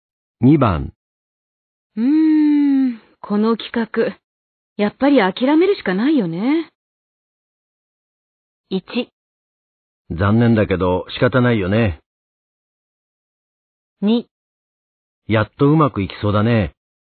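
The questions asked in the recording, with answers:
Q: うーん、この企画、やっぱり諦めるしかないよね。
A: 1: 残念だけど仕方ないよね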